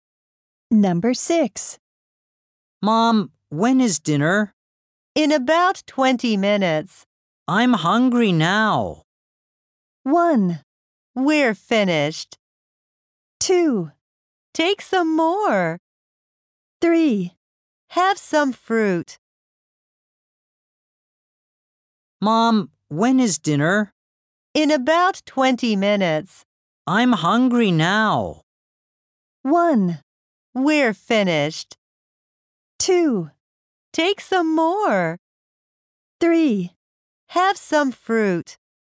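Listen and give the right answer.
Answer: 3: Have some fruit.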